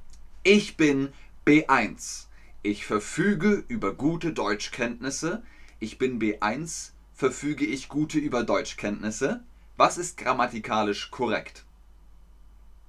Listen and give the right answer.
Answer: Richtig. Ich verfüge über gute Deutschkenntnisse.